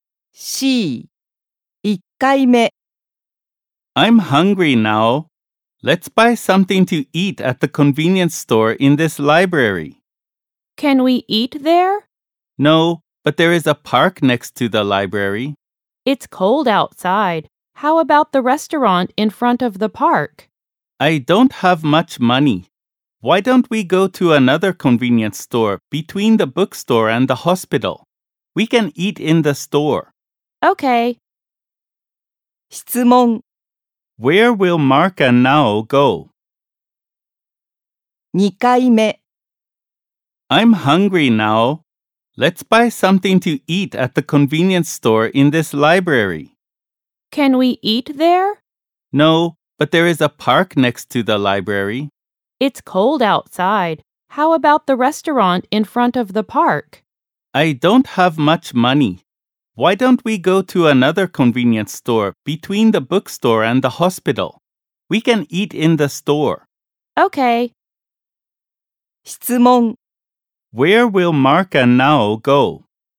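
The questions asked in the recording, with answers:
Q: Where will Mark and Nao go?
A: To the convenience store between the bookstore and the hospital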